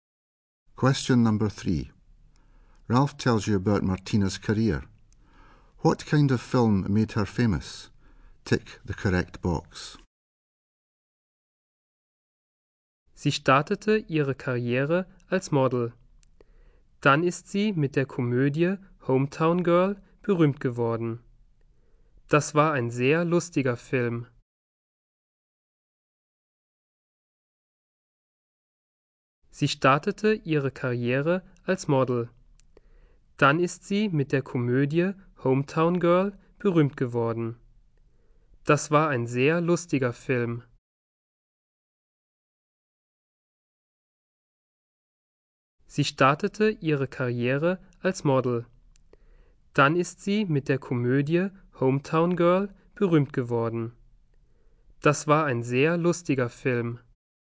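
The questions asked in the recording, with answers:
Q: What kind of film made her famous?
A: A comedy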